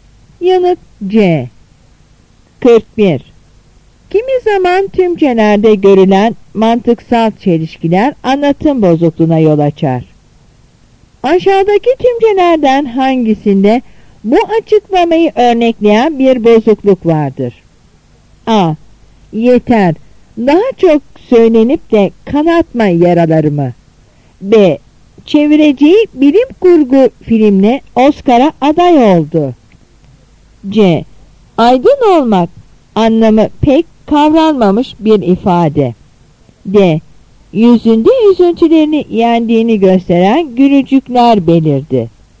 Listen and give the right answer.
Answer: Yanıt B.